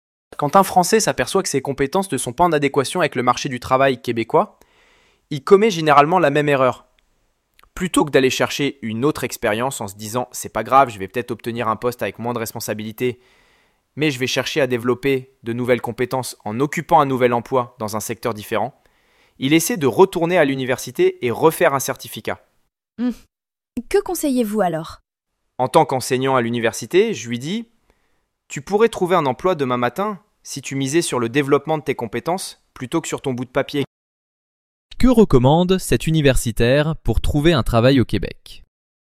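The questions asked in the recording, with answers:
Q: Que recommande cet universitaire pour trouver un travail au Québec?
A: Miser sur le développement de ses compétences plutôt que sur un diplôme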